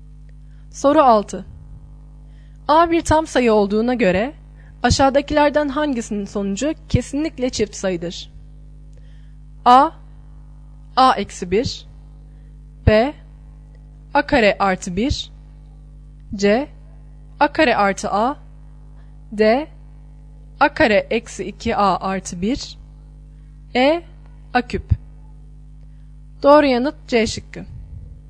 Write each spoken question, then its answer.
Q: A bir tam sayı olduğuna göre aşağıdakilerden hangisinin sonucu kesinlikle çift sayıdır?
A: Doğru yanıt C şıkkı.